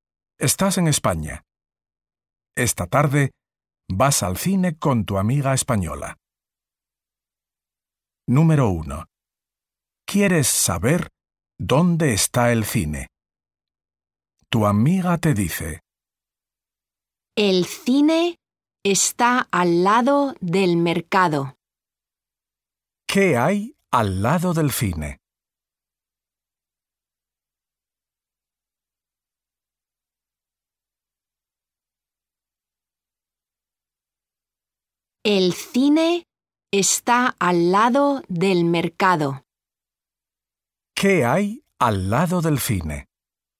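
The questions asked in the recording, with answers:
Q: ¿Qué hay al lado del cine?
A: el mercado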